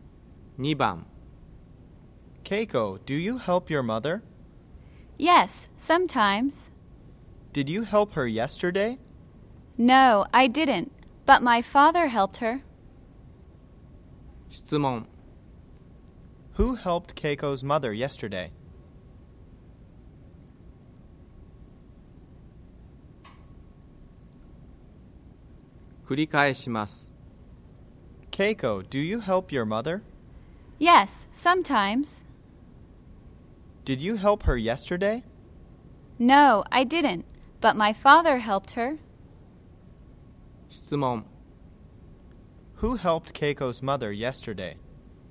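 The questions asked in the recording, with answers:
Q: Who helped Keiko's mother yesterday?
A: Her father did.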